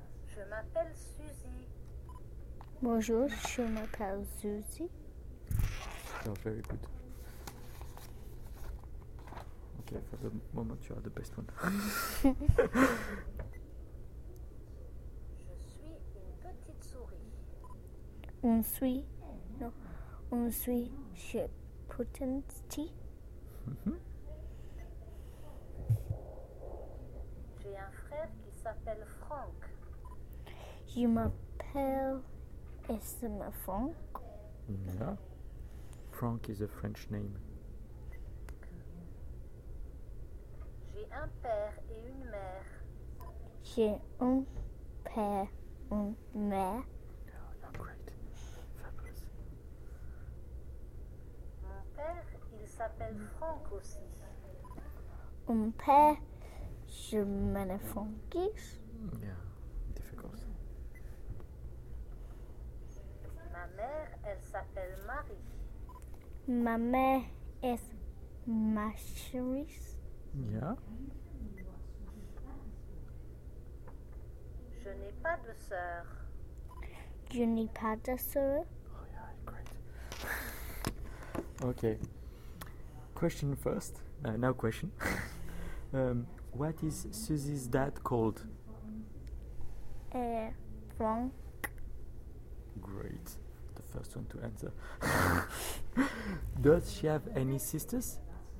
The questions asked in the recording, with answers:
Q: What is Suzy's dad called?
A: Franck.

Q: Does she have any sisters?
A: No, she doesn't have.